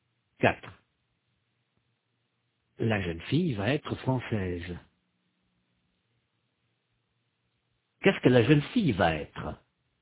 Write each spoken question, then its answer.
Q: Qu'est-ce que la jeune fille va être?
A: Française. Elle va être française.